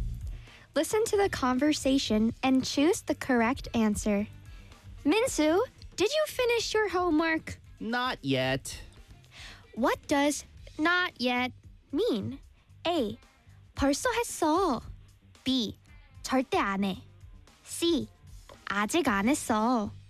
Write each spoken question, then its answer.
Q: What does not yet mean?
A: 그래서 아직 안 했어. Not yet.